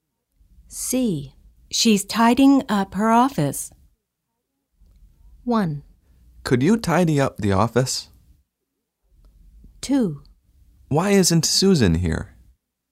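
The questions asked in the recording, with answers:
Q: She's tidying up her office.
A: 2: Why isn't Susan here?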